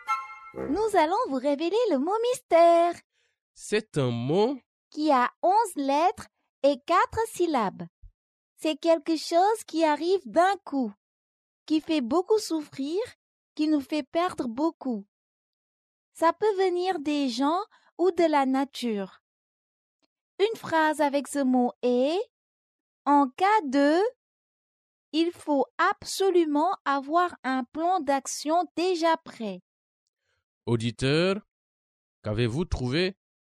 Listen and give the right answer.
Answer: Le mot mystère est « catastrophe ».